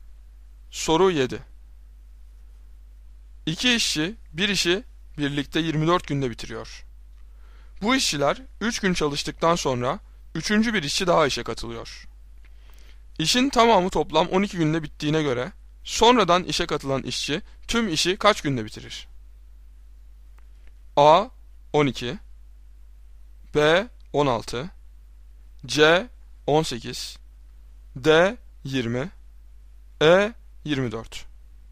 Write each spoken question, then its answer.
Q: İşin tamamı toplam 12 günde bittiğine göre sonradan işe katılan işçi tüm işi kaç günde bitirir?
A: Doğru cevap C 18.